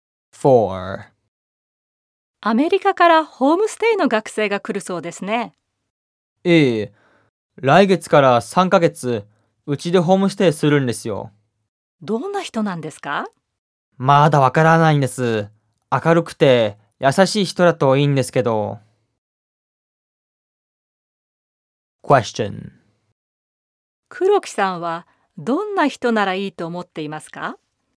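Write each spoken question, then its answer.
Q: 黒木さんはどんな人ならいいと思っていますか?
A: 明るくて優しい人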